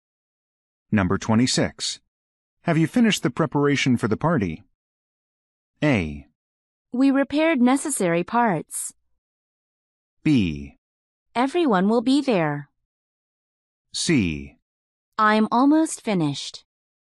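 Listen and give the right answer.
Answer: C: I'm almost finished.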